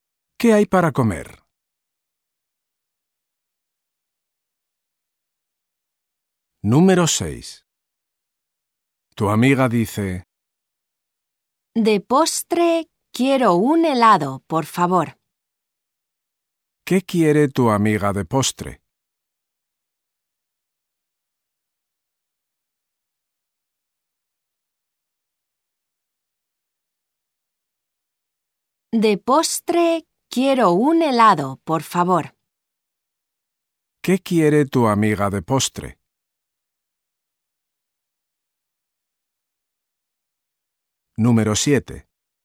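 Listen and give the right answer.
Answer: Un helado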